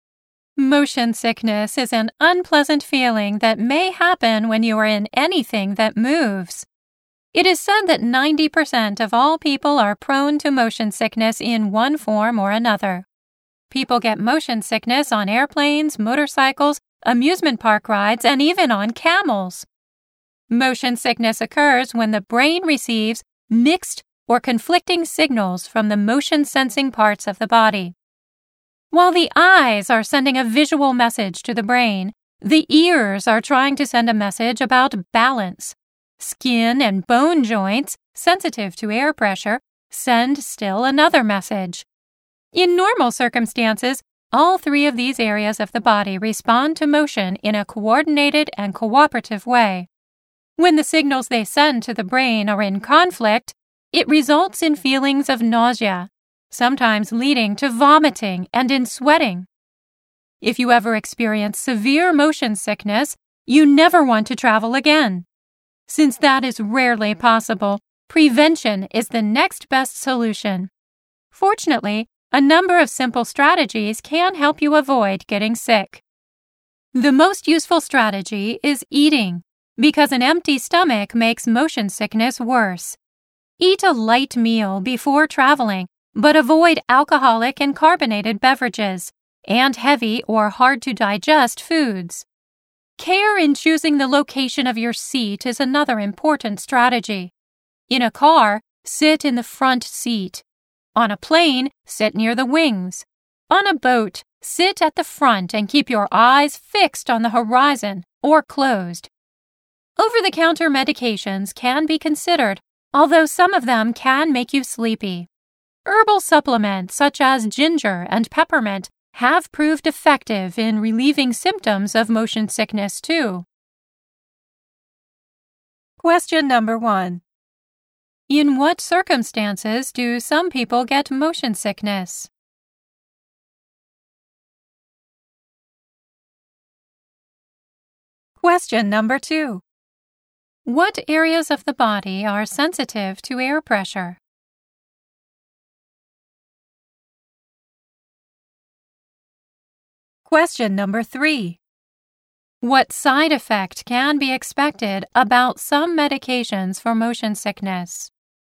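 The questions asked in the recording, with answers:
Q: In what circumstances do some people get motion sickness?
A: When they are in anything that moves, such as airplanes, motorcycles, amusement park rides, or camels

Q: What areas of the body are sensitive to air pressure?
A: Skin and bone joints

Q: What side effect can be expected about some medications for motion sickness?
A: They can make you sleepy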